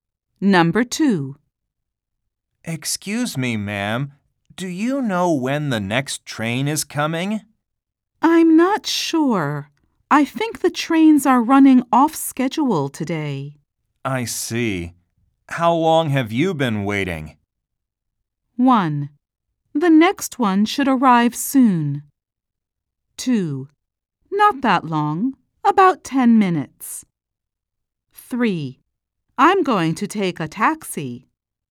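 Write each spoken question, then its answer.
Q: I see. How long have you been waiting?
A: 2: Not that long, about 10 minutes.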